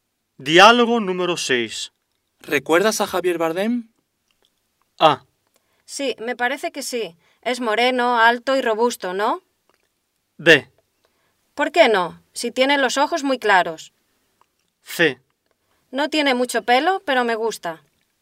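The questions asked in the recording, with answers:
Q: ¿Recuerdas a Javier Bardem?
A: A: Sí, me parece que sí. Es moreno, alto y robusto, ¿no?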